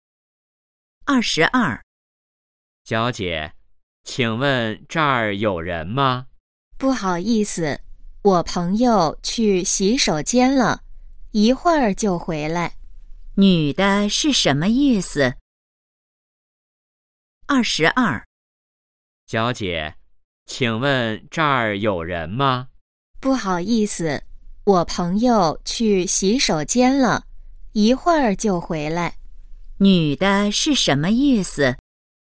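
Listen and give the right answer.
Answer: 这个座位有人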